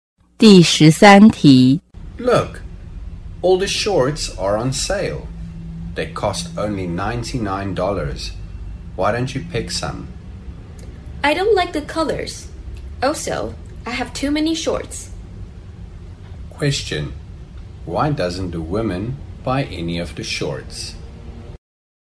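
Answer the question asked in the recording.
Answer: She doesn't like the colors and already has too many shorts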